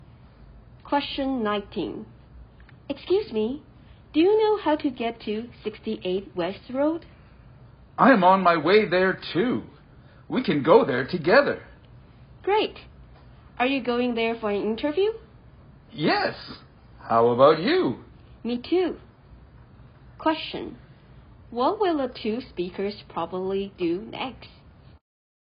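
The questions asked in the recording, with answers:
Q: What will the two speakers probably do next?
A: Go to 68 West Road together for their interviews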